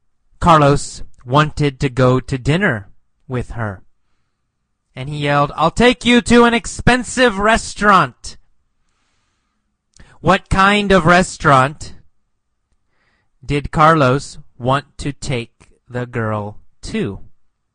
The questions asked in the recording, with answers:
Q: What kind of restaurant did Carlos want to take the girl to?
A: What kind? An expensive restaurant, right?